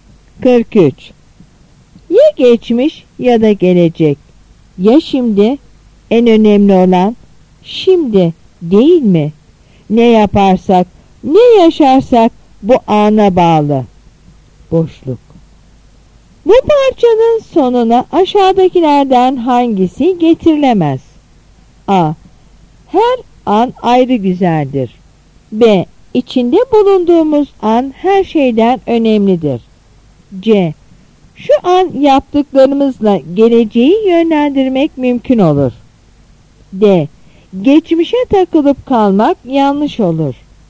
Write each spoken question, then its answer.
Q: Bu parçanın sonuna aşağıdakilerden hangisi getirilemez?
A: Yanıt A.